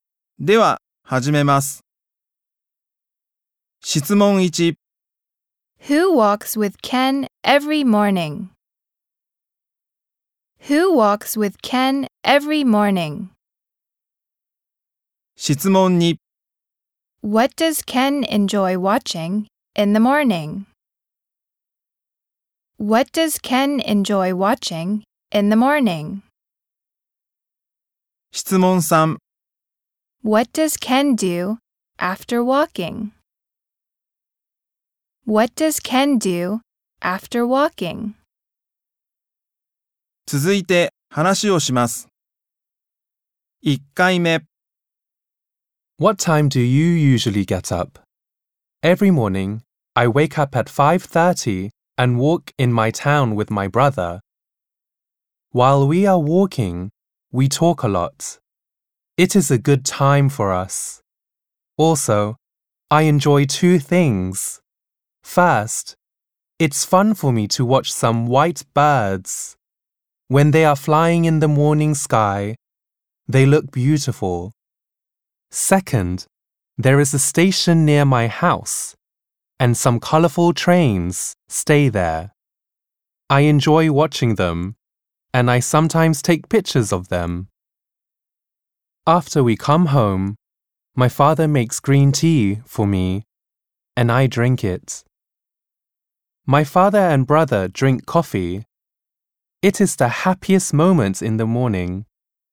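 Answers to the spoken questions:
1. His brother
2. Some white birds and colorful trains
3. He drinks green tea his father makes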